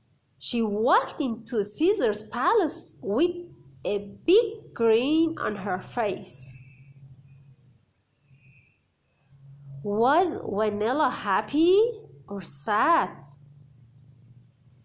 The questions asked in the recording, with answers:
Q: Was Vanilla happy or sad?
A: She was happy.